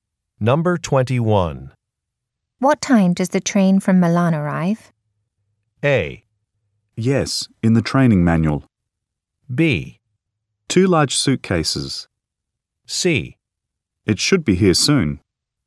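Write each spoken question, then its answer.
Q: What time does the train from Milan arrive?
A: C: It should be here soon.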